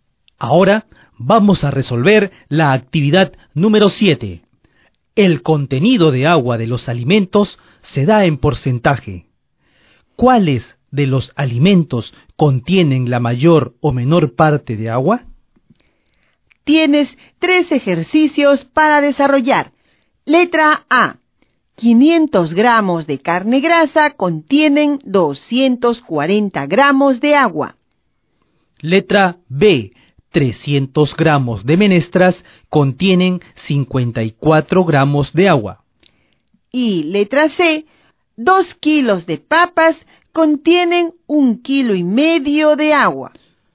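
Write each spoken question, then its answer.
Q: ¿Cuáles de los alimentos contienen la mayor o menor parte de agua?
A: Mayor: las papas (75%); menor: las menestras (18%)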